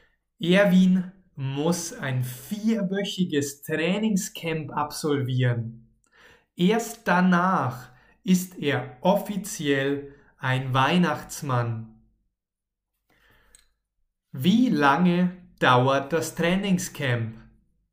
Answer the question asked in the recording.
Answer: Vier Wochen. Das Trainingscamp dauert 4 Wochen.